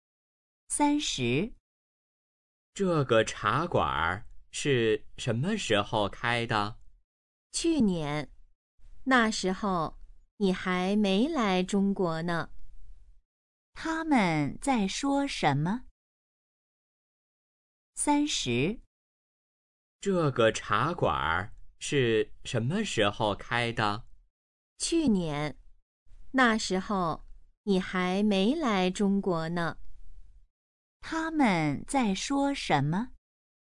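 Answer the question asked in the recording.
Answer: 茶馆是什么时候开的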